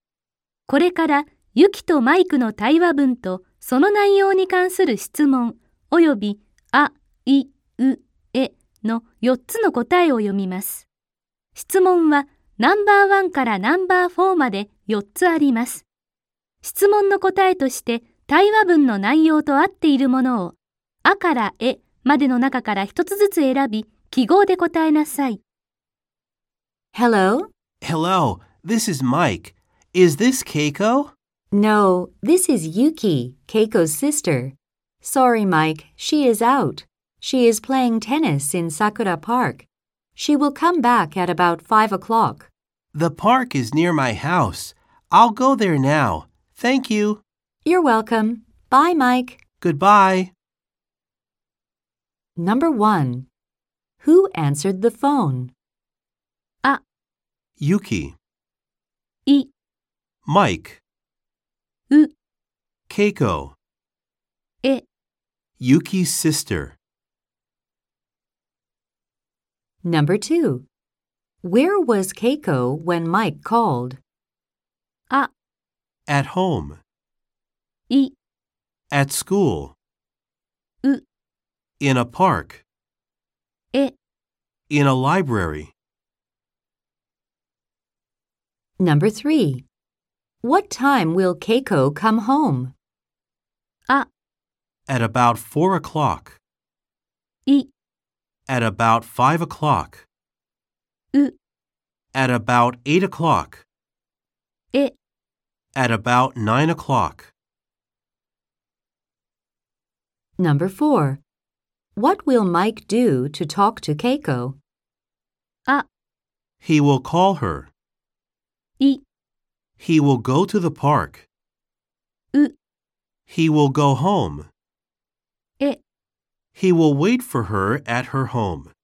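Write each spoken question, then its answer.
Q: Who answered the phone?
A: あ: Yuki.

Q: Where was Keiko when Mike called?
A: う: In a park.

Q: What time will Keiko come home?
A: い: At about 5 o'clock.

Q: What will Mike do to talk to Keiko?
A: い: He will go to the park.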